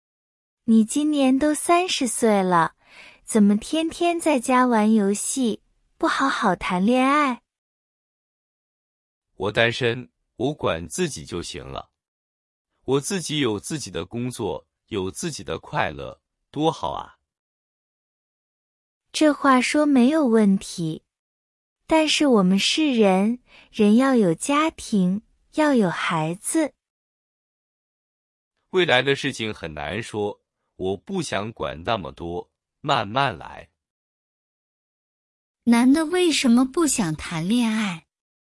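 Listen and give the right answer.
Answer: 他觉得单身很好,有自己的工作和快乐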